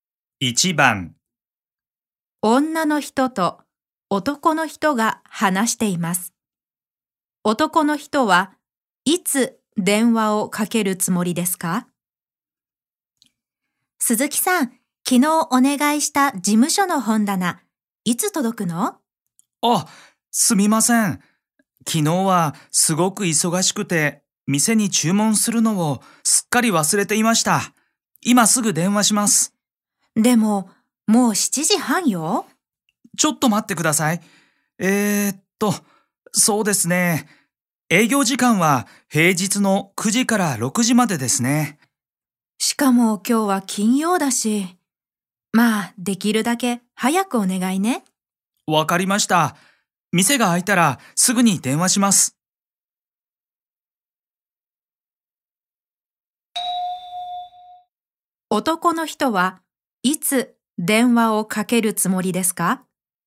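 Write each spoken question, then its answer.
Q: 男の人はいつ電話をかけるつもりですか?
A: 月曜日の朝9時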